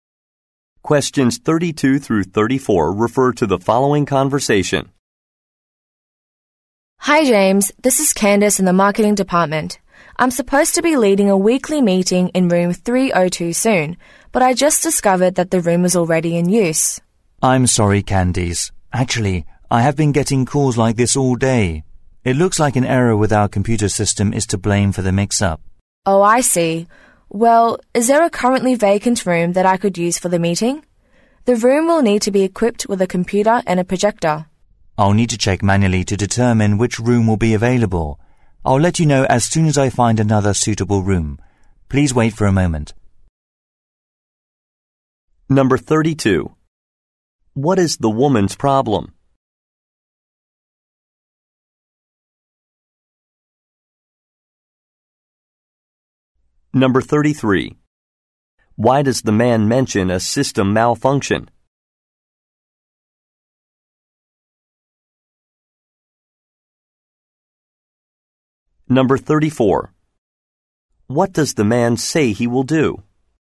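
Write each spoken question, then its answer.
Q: What is the woman's problem?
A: Her meeting room is already in use

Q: Why does the man mention a system malfunction?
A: To explain the room booking mix-up

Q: What does the man say he will do?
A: Check for another available room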